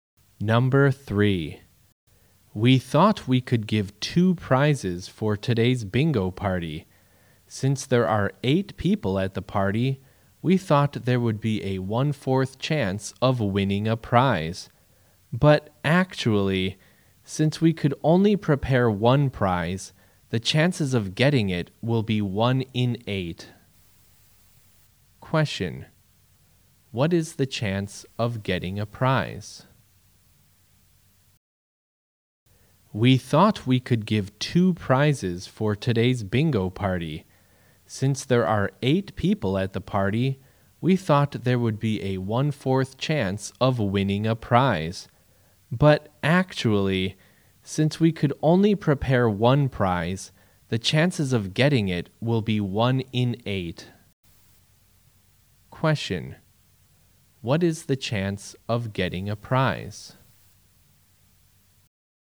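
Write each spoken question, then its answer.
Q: What is the chance of getting a prize?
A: 1 in 8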